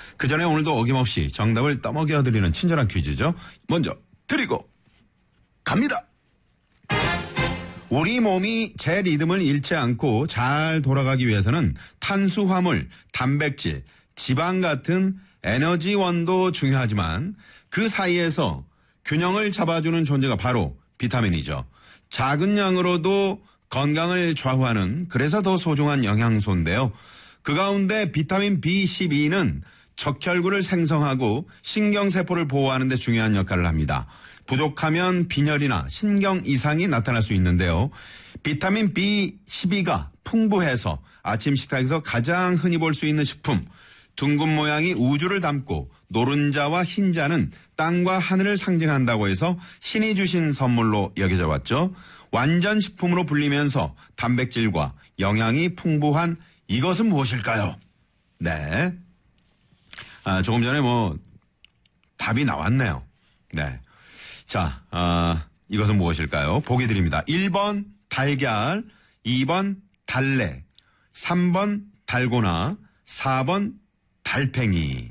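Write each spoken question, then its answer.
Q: 완전식품으로 불리면서 단백질과 영양이 풍부한 이것은 무엇일까요?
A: 1: 달걀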